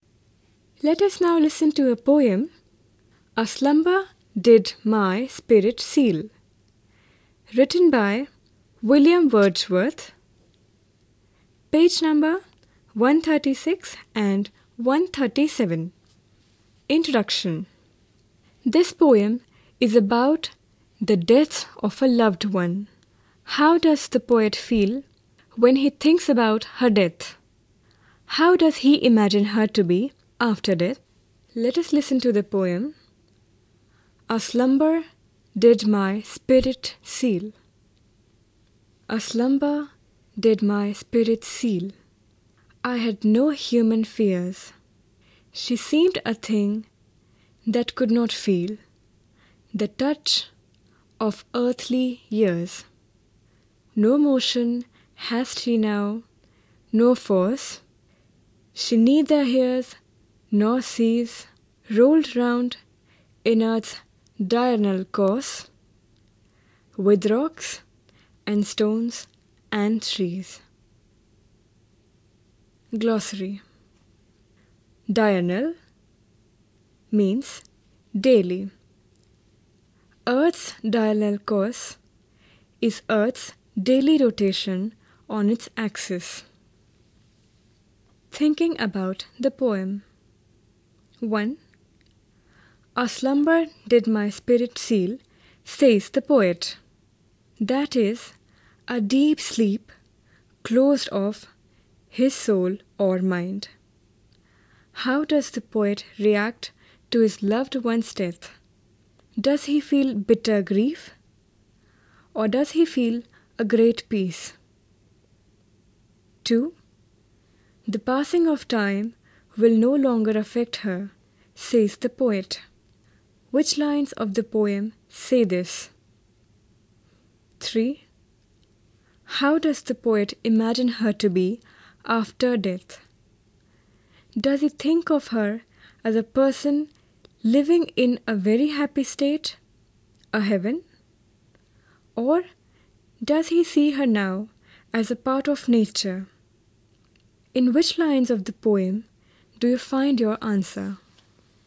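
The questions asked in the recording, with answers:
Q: How does the poet imagine her to be after death?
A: As a part of nature, rolled round with rocks, stones and trees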